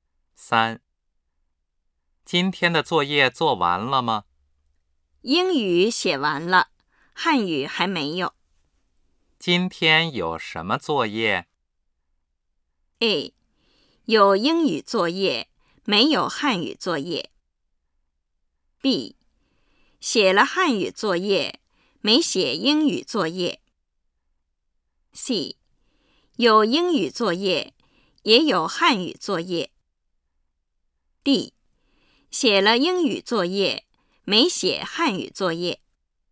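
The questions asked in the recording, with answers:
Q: 今天有什么作业?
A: C: 有英语作业,也有汉语作业。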